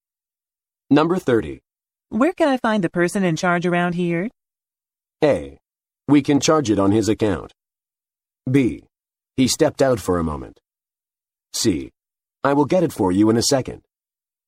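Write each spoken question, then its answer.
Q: Where can I find the person in charge around here?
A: B: He stepped out for a moment.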